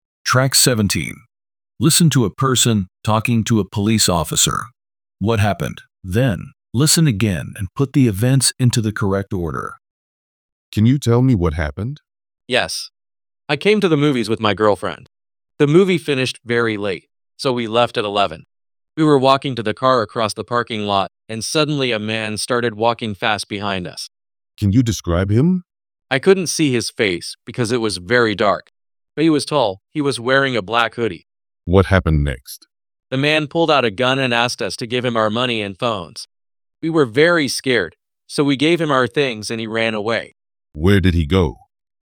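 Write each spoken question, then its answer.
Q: What happened?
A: A man with a gun robbed the speaker and his girlfriend of their money and phones in the parking lot after the movie.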